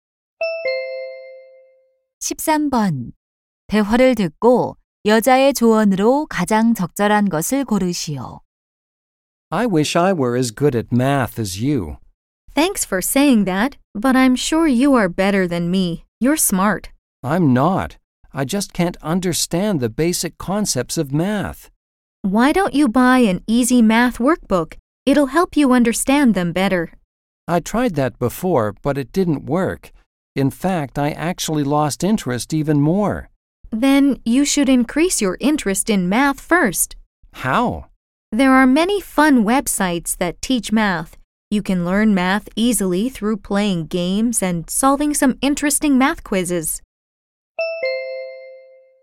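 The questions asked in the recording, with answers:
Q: 여자의 조언으로 가장 적절한 것을 고르시오.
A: 재미있는 수학 웹사이트로 흥미를 높여라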